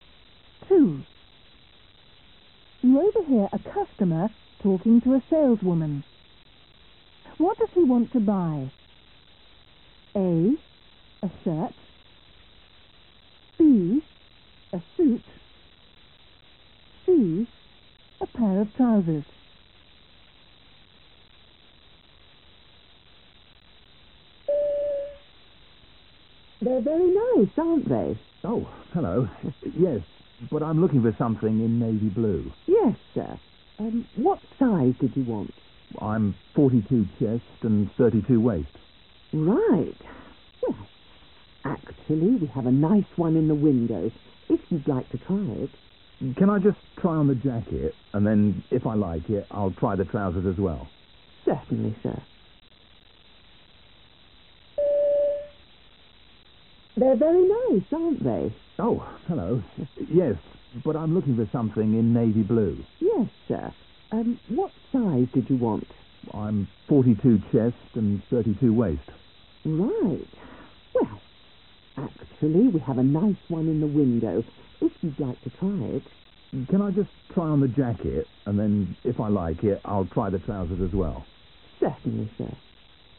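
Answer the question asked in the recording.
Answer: B: A suit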